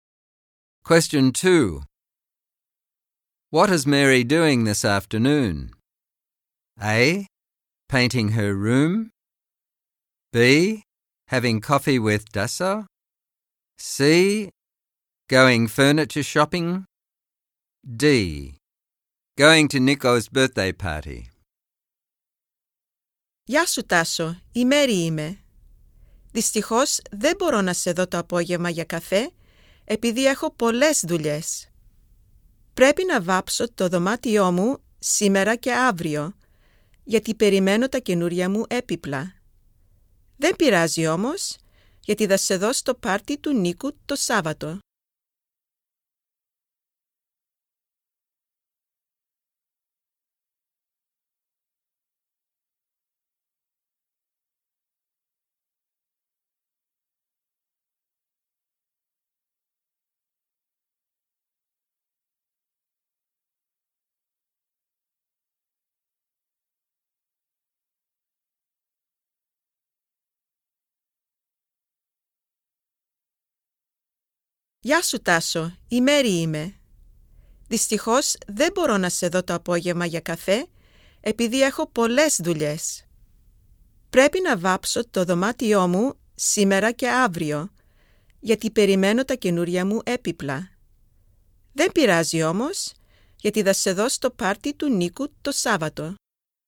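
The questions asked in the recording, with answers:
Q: What is Mary doing this afternoon?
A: A: Painting her room.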